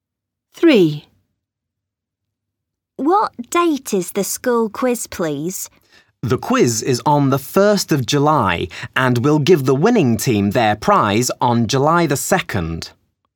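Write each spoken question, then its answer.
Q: What date is the school quiz, please?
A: The 1st of July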